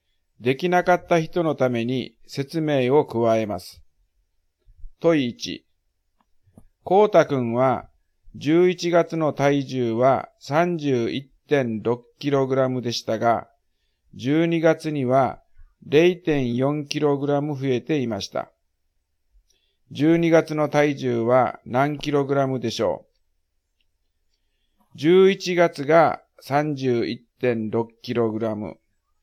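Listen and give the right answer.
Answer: 32kg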